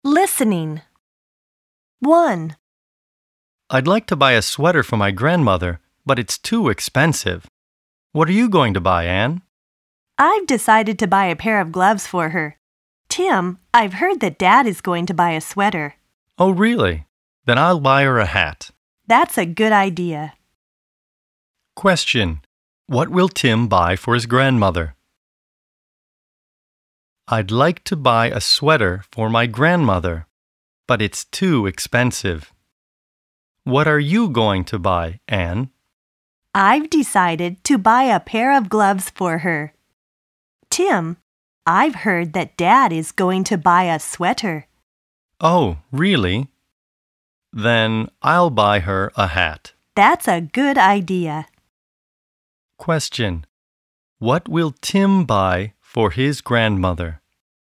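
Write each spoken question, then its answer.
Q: What will Tim buy for his grandmother?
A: A hat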